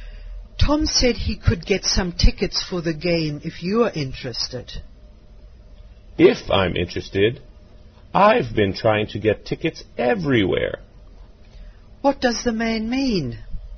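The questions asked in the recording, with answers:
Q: What does the man mean?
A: He is very interested in getting tickets.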